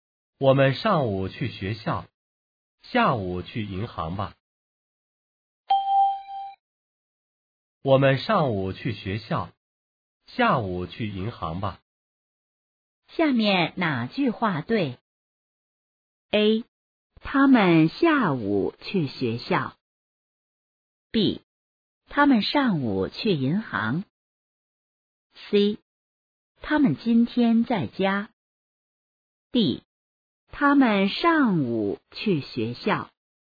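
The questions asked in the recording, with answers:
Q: 下面哪句话对?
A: D: 他们上午去学校。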